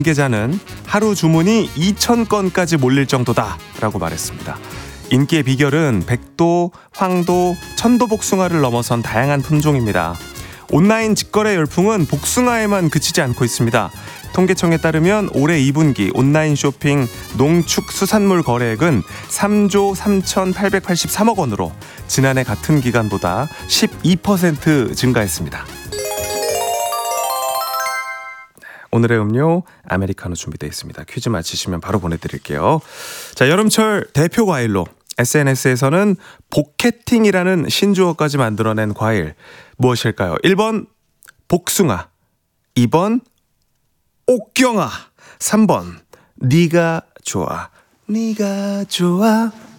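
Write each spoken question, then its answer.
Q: 자, 여름철 대표 과일로 SNS에서는 복캐팅이라는 신조어까지 만들어낸 과일 무엇일까요?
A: 1: 복숭아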